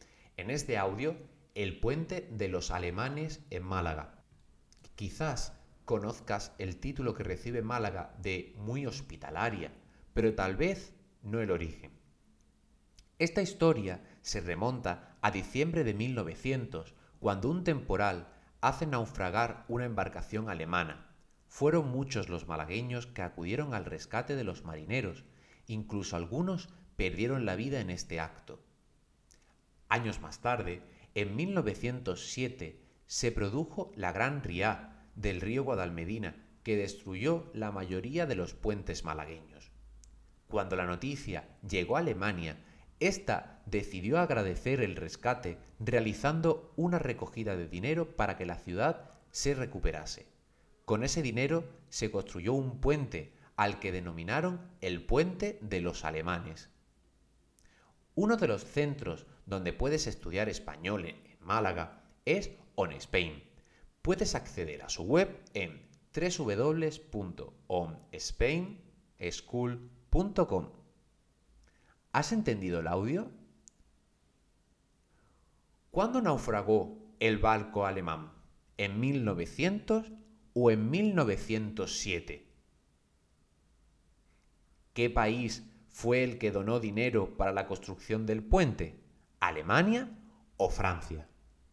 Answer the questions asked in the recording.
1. El barco alemán se hundió en 1900
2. fueron ellos, los alemanes, los que donaron dinero para la construcción de un puente en Málaga